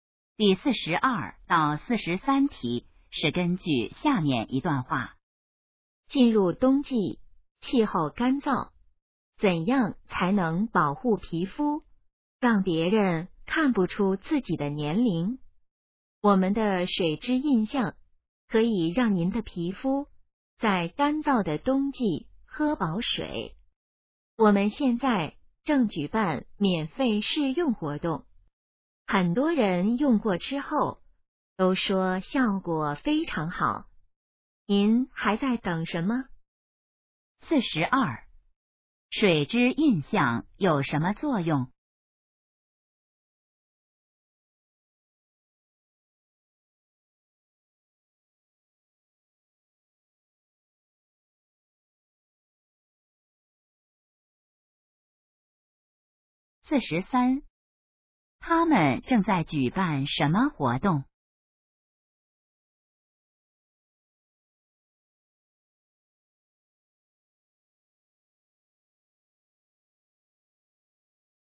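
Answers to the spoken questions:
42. 给皮肤补水
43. 免费试用活动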